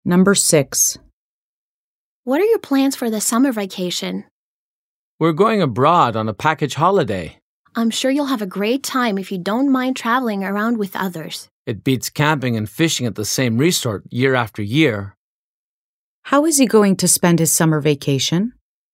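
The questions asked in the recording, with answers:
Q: How is he going to spend his summer vacation?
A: He's going abroad on a package holiday.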